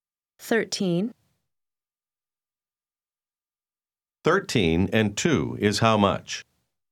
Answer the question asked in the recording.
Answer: 15.